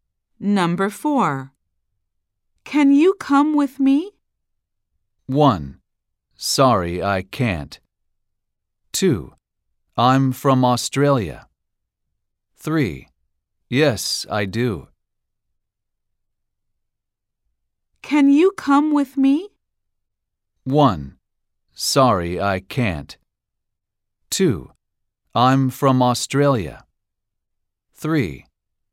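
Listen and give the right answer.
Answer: 1: Sorry, I can't.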